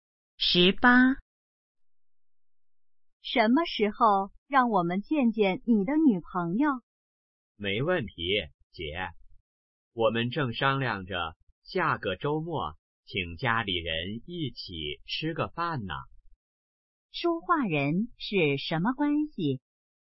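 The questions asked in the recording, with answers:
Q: 说话人是什么关系?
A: 姐弟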